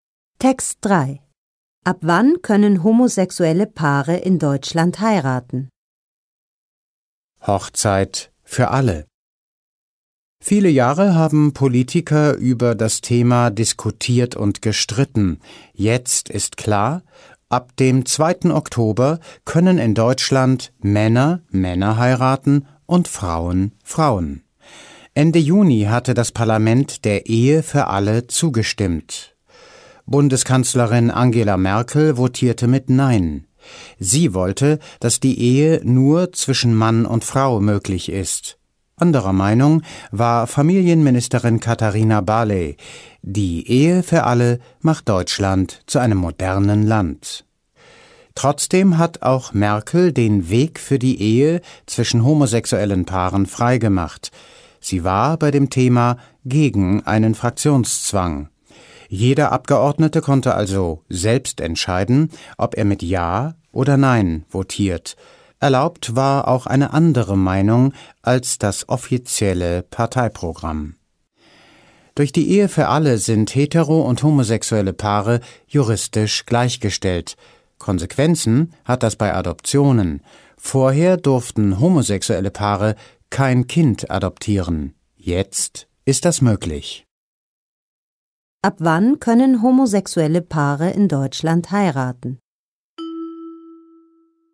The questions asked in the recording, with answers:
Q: Ab wann können homosexuelle Paare in Deutschland heiraten?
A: Sie können ab dem 2. Oktober heiraten.